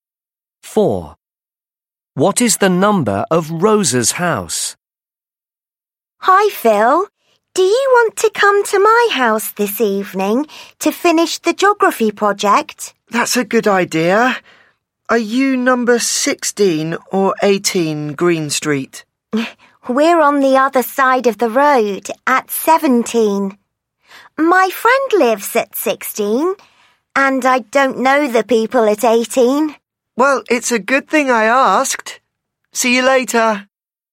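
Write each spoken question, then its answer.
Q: What is the number of Rosa's house?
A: 17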